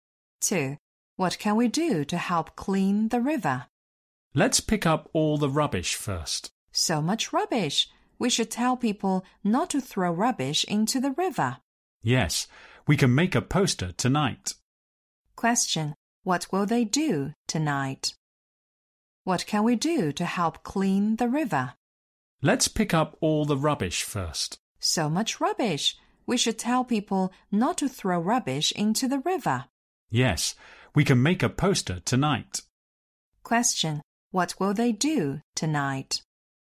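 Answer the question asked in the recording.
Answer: Make a poster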